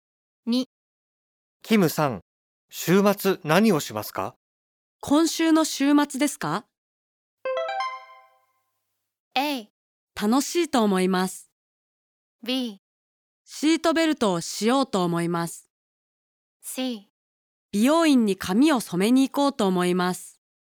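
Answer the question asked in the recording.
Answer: C: 美容院に髪を染めに行こうと思います。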